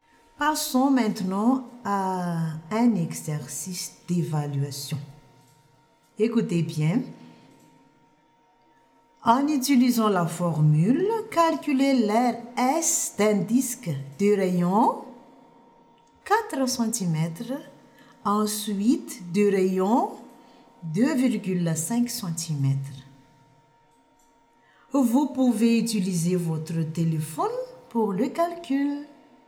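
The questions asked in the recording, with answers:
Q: En utilisant la formule, calculez l'air S d'un disque de rayon 4 cm, ensuite de rayon 2,5 cm.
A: 50,24 cm2 et 19,625 cm2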